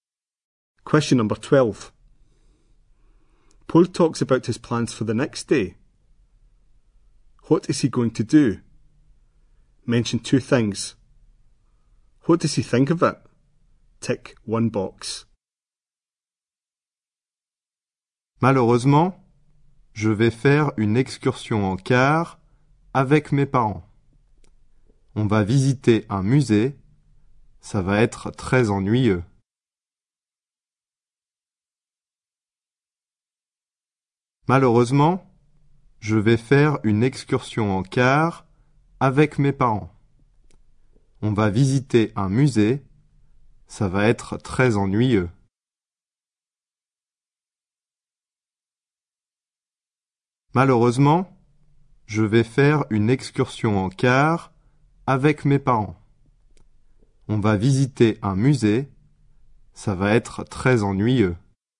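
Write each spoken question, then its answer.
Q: What is he going to do? Mention two things.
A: Go on a coach trip with his parents; visit a museum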